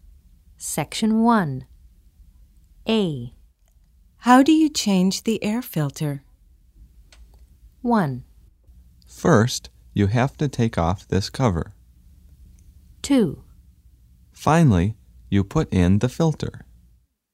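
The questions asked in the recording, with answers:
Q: How do you change the air filter?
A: 1: First, you have to take off this cover.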